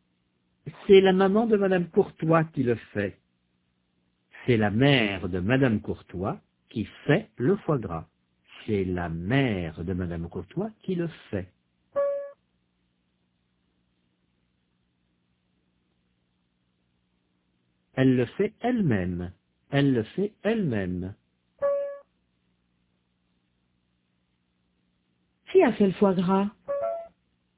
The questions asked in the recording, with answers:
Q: Qui a fait le foie gras?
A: La maman de madame Courtois.